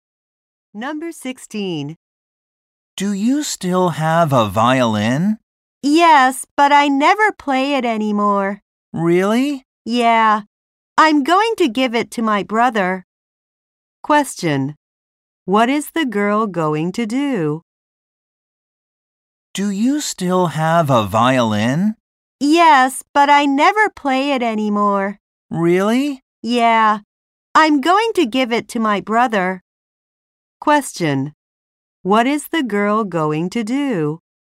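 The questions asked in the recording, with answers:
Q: What is the girl going to do?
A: Give her violin to her brother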